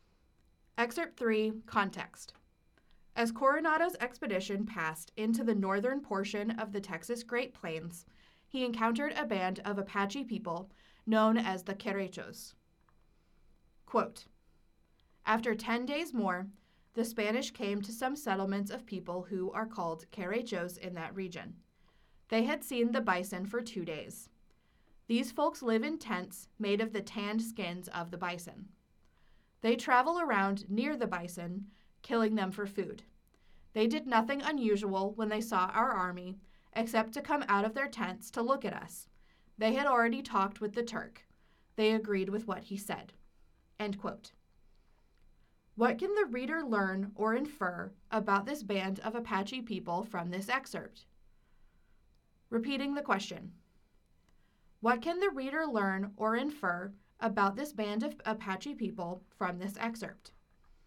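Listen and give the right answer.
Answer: They were nomadic bison hunters living in bison-skin tents, calm toward the army, and had talked with the Turk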